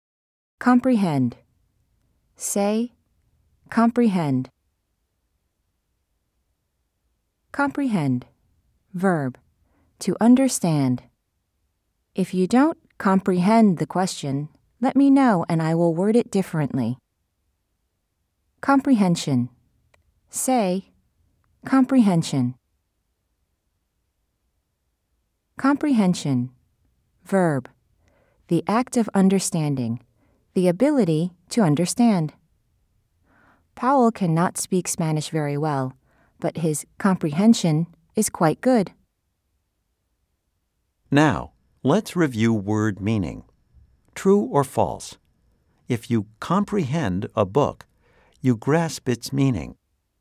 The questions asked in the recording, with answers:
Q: True or false? If you comprehend a book, you grasp its meaning.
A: If you said yes, you are correct.